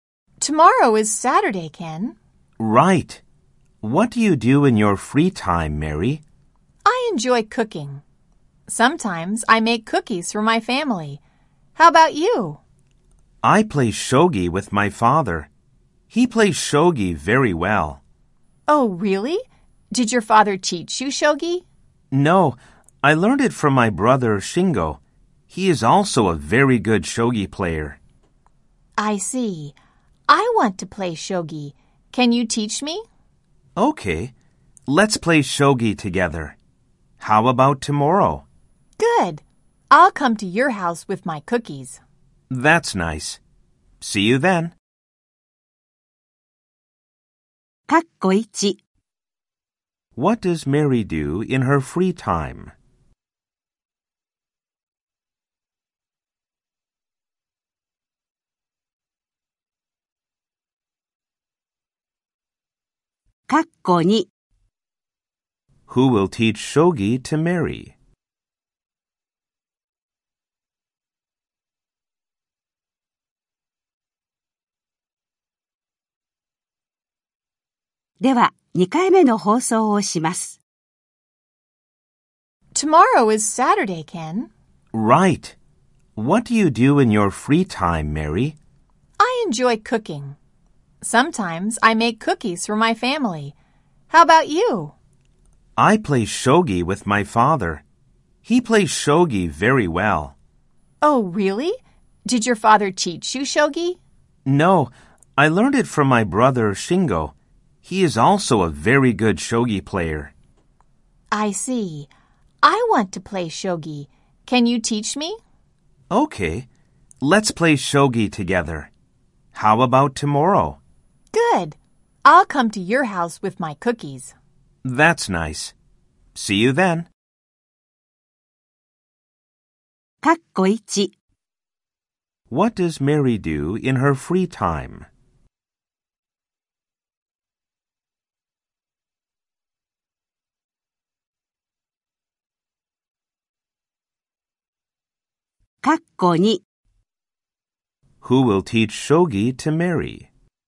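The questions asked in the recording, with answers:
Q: What does Mary do in her free time?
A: She enjoys cooking.

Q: Who will teach shogi to Mary?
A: Ken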